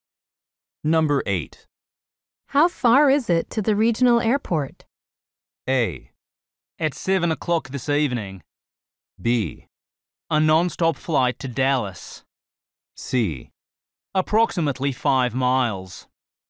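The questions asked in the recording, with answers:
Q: How far is it to the regional airport?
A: C: Approximately 5 miles.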